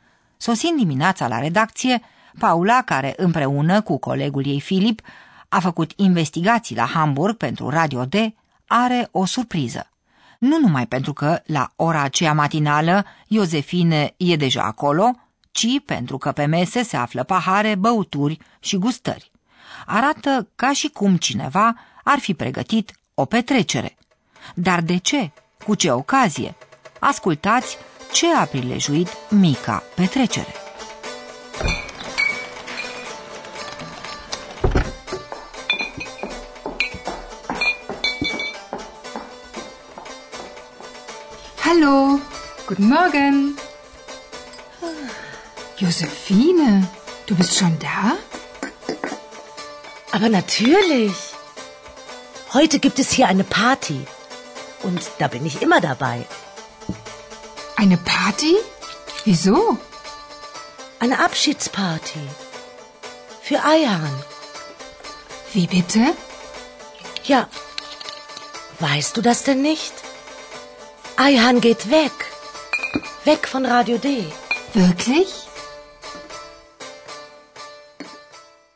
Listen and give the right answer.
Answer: Mica petrecere e pentru Aihan.